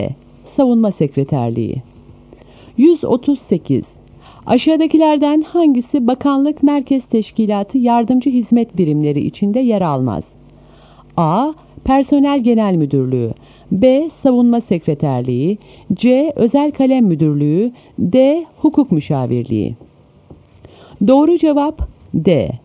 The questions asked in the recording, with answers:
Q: Aşağıdakilerden hangisi bakanlık merkez teşkilatı yardımcı hizmet birimleri içinde yer almaz?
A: Doğru cevap D.